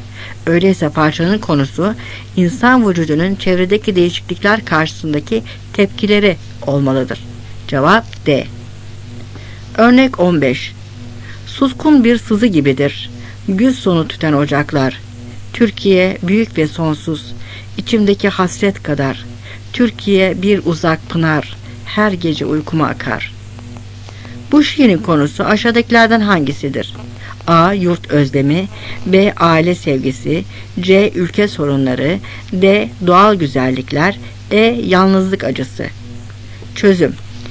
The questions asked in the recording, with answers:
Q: Bu şiirin konusu aşağıdakilerden hangisidir?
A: Cevap A.